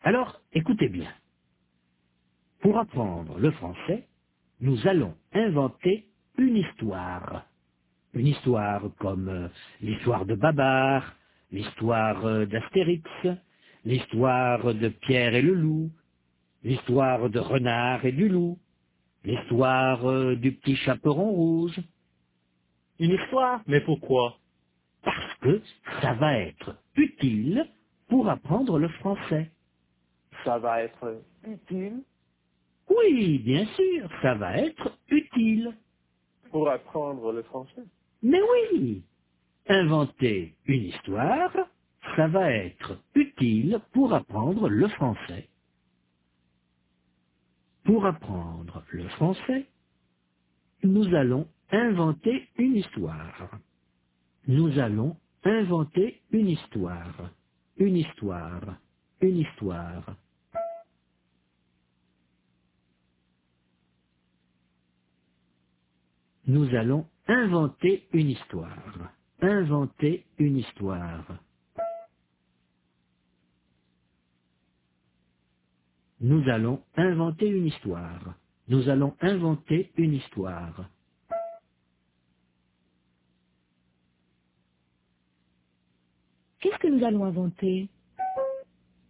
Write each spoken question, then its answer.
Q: Qu'est-ce que nous allons inventer?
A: Une histoire.